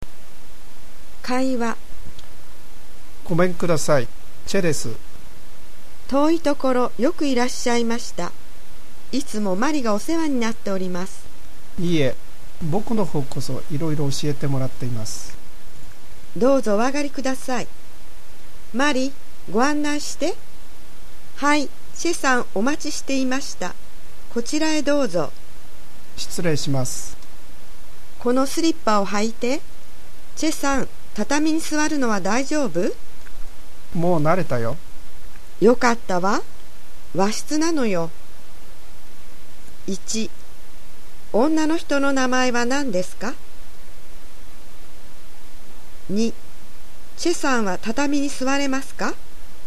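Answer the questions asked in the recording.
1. マリ
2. はい、座れます(もう慣れた)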